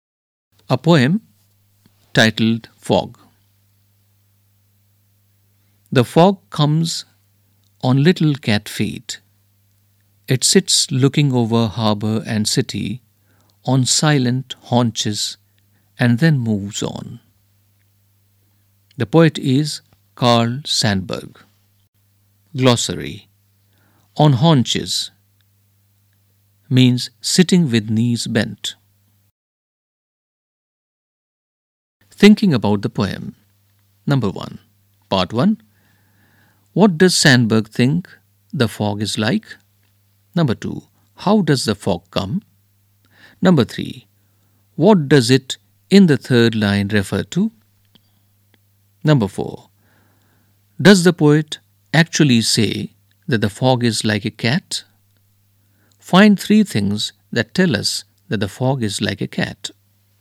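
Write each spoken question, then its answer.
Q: What does Sandburg think the fog is like?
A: A cat

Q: How does the fog come?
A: On little cat feet, silently

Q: What does it in the third line refer to?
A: The fog

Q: Does the poet actually say that the fog is like a cat?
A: No; it comes on little cat feet, sits on silent haunches, looks over harbor and city, then moves on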